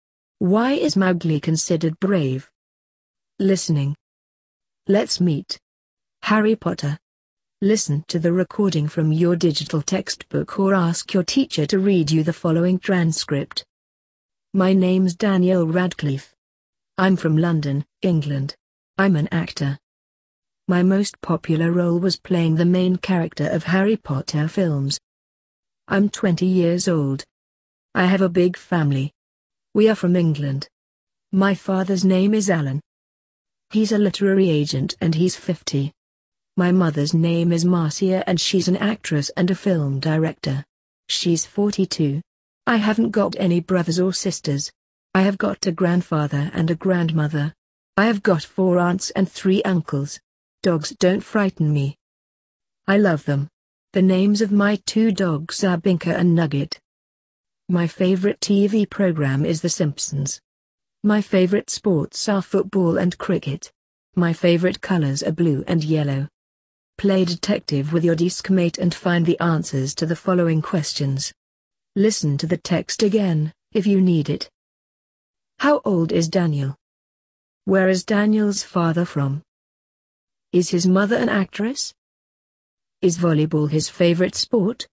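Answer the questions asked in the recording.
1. He's 20 years old.
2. England
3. Yes, she is.
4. No, his favorite sports are football and cricket.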